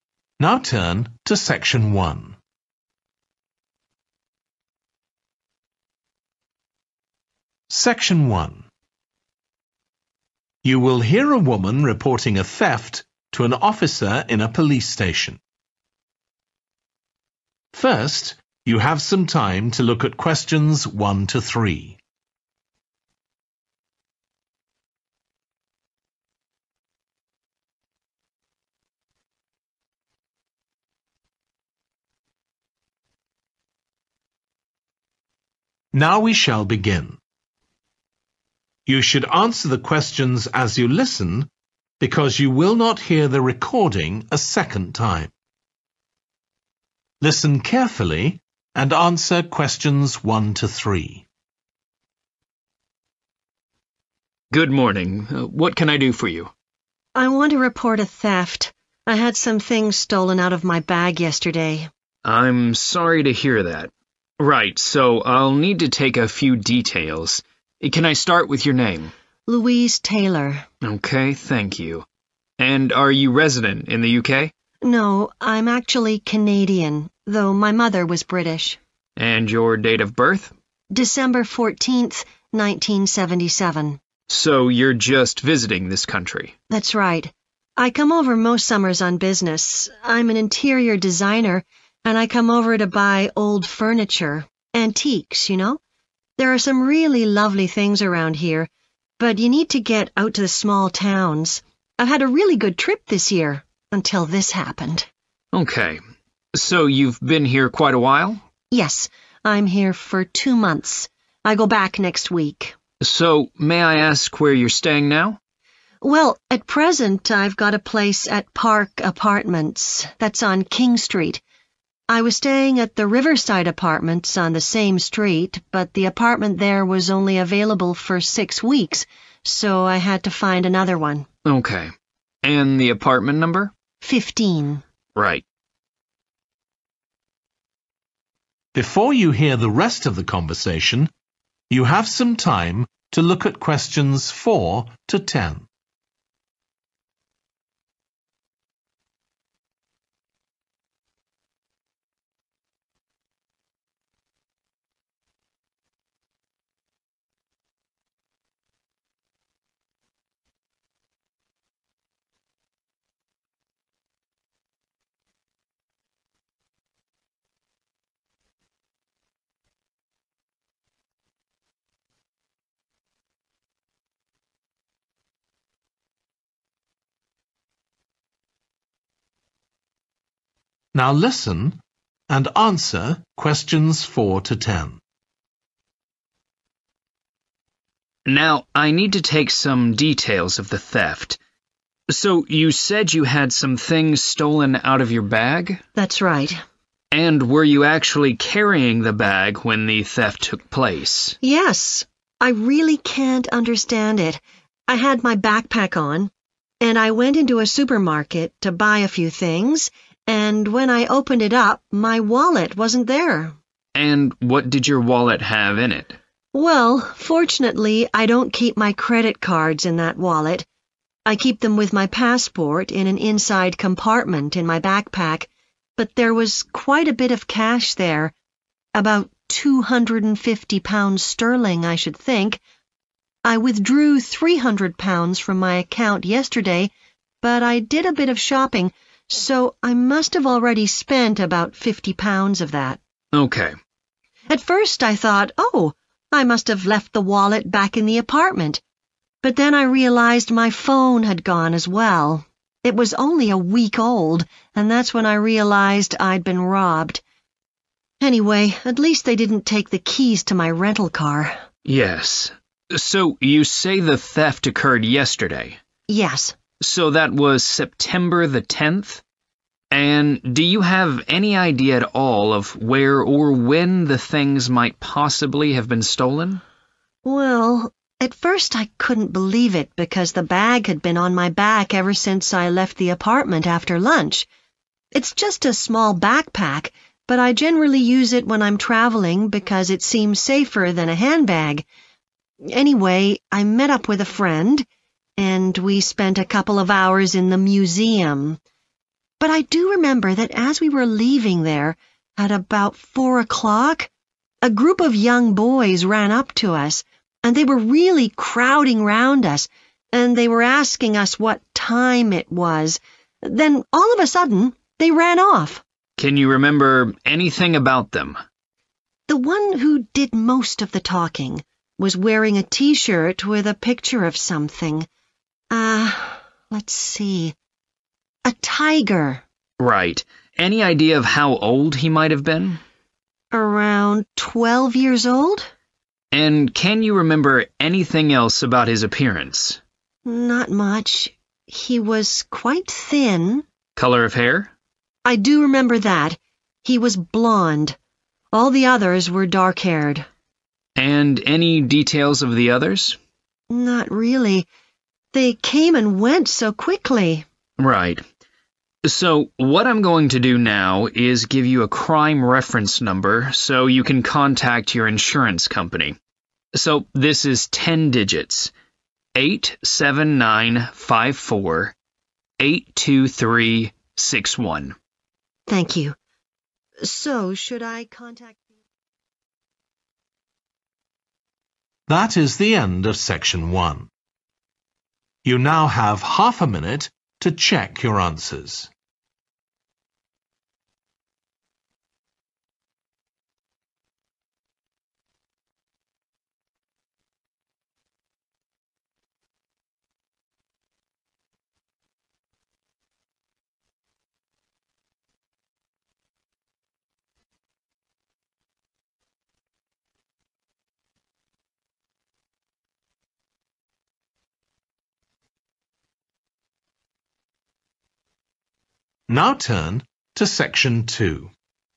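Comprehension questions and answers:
Complete the form below. Write ONE WORD AND/OR A NUMBER for each answer.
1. Nationality: (1)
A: Canadian

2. Reason for visit: business (to buy antique (2) )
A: furniture

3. Current address: (3) Apartments (No 15)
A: Park

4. – a wallet containing approximately (4) £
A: 250

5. – a (5)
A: phone

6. Date of theft: (6)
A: 10 September

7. Location: outside the (7) at about 4 pm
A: museum

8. – some boys asked for the (8) then ran off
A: time

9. – he was about 12, slim build with (9) hair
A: blonde

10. Crime reference number allocated – (10)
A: 8795482361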